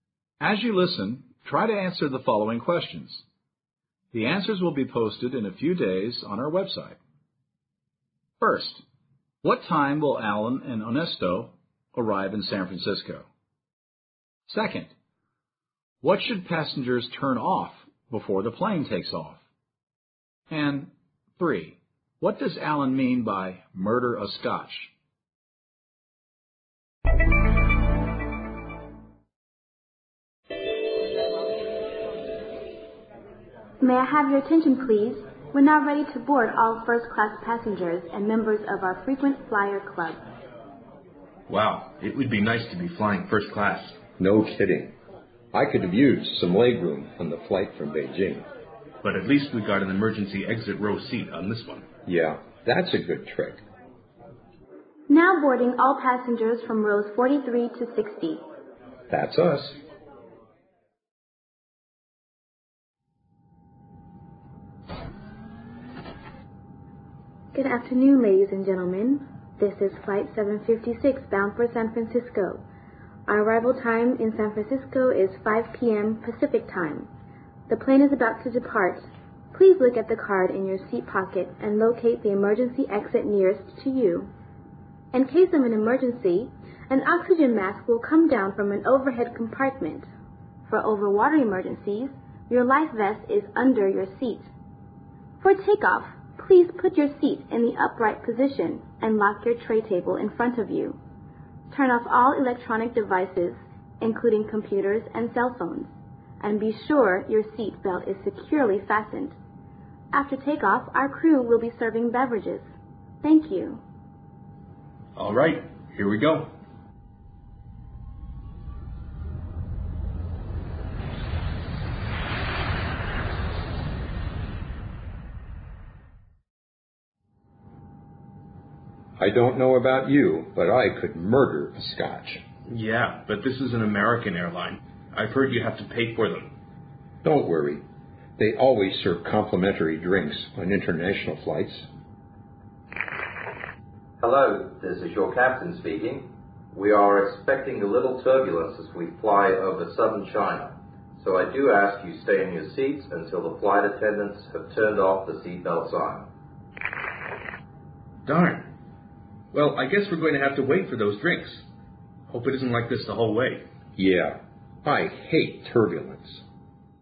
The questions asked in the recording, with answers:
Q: what should passengers turn off before the plane takes off?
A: She asks the passengers to turn off all electronic devices such as cell phones and computers

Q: what does Alan mean by murder a Scotch?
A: I could murder a Scotch means something like, I really, really want a drink right now.